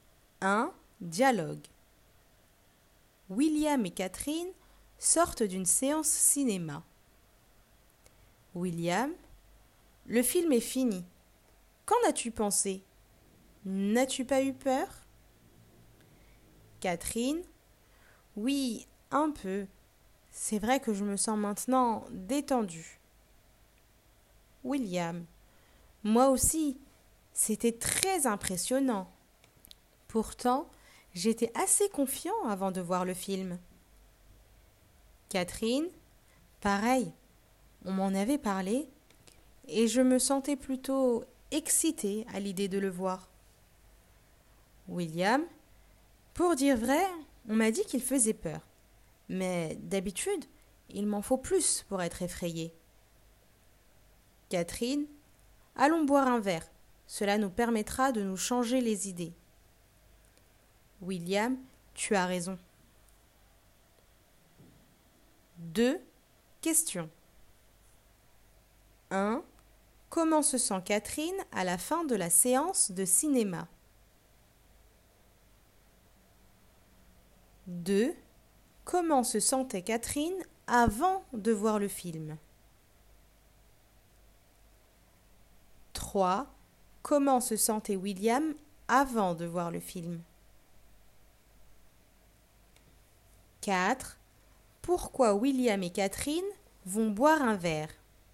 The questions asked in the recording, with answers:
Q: Comment se sent Catherine à la fin de la séance de cinéma?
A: Elle est détendue.

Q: Comment se sentait Catherine avant de voir le film?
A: Elle était excitée.

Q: Comment se sentait William avant de voir le film?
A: Il était confiant.

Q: Pourquoi William et Catherine vont boire un verre?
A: Pour se changer les idées.